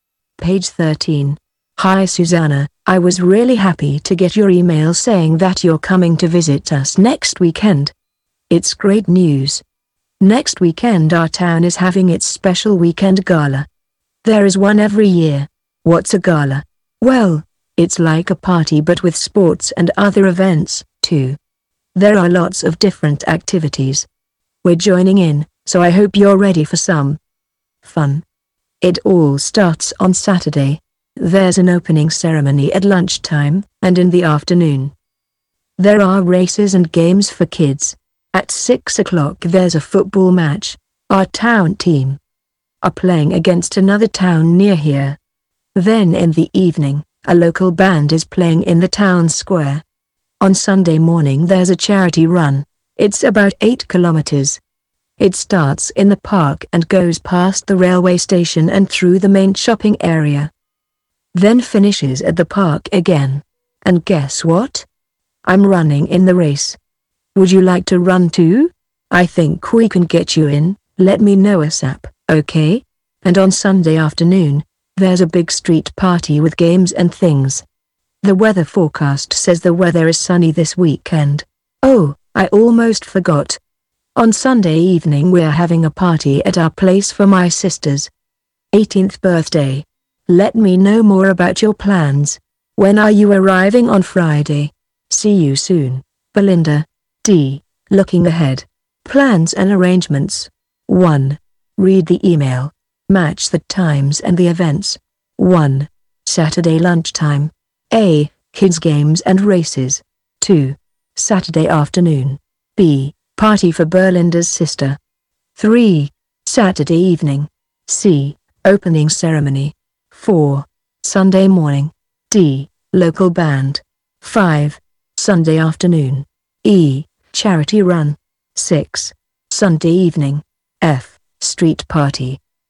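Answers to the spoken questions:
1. C: Opening ceremony.
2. A: Kids games and races.
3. D: Local band.
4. E: Charity run.
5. F: Street party.
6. B: Party for Belinda's sister.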